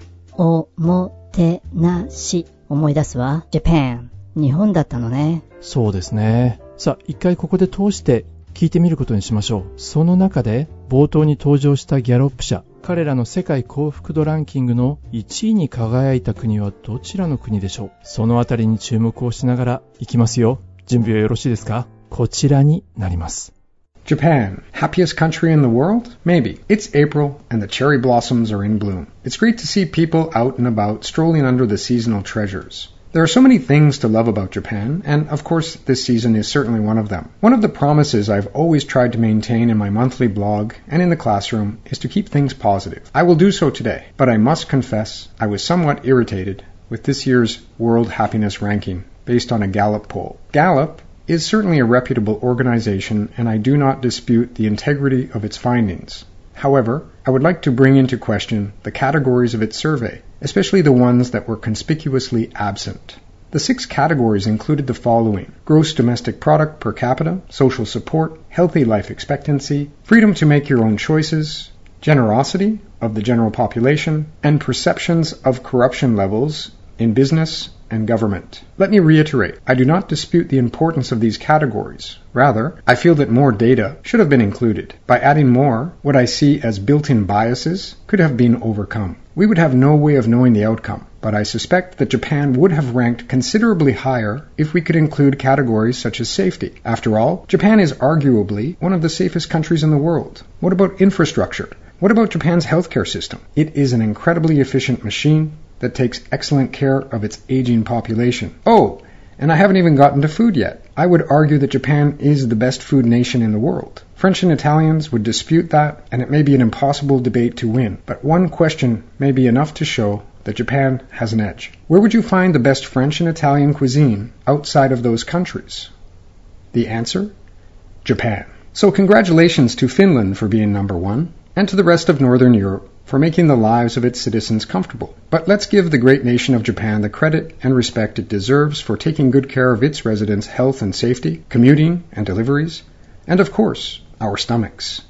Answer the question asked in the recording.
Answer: どうやら1位はフィンランドだったようですね。